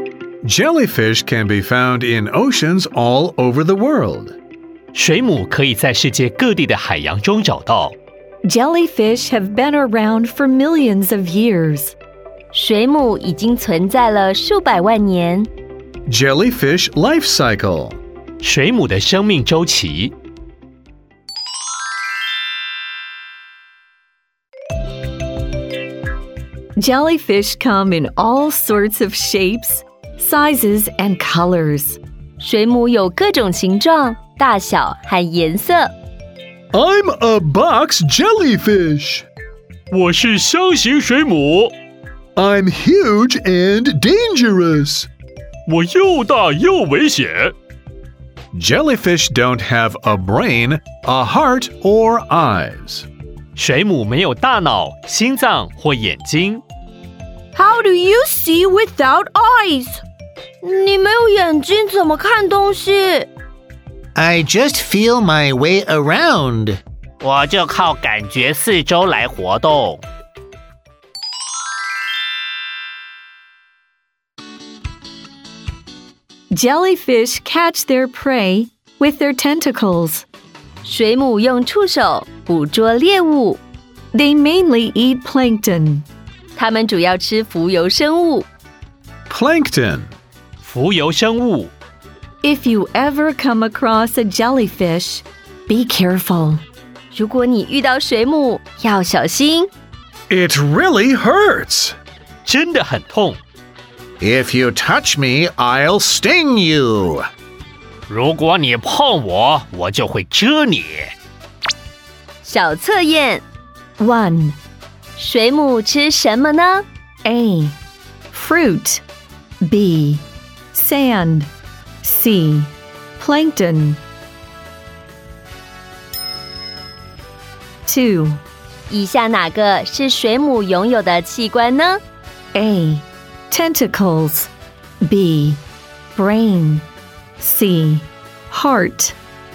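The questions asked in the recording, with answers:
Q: 水母吃什么呢?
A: C: Plankton

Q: 以下哪个是水母拥有的器官呢?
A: A: Tentacles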